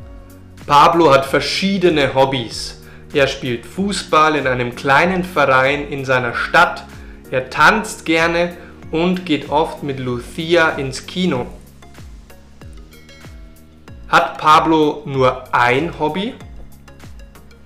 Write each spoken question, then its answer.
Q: Hat Pablo nur ein Hobby?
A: Nein, Pablo hat nicht nur ein Hobby.